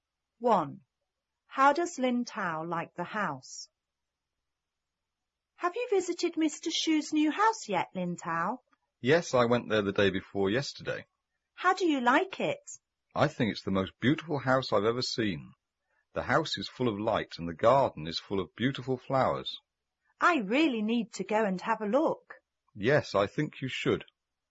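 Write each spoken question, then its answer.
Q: How does Lin Tao like the house?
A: He thinks it's the most beautiful house he has ever seen.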